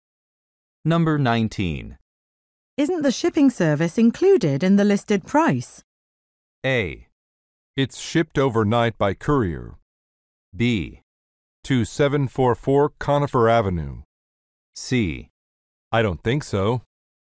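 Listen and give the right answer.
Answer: C: I don't think so.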